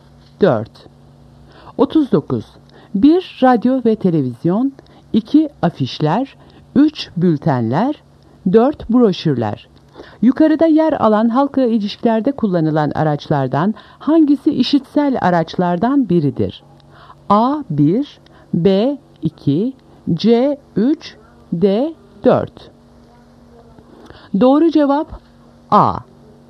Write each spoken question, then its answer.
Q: Yukarıda yer alan halkla ilişkilerde kullanılan araçlardan hangisi işitsel araçlardan biridir?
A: Doğru cevap A. 1.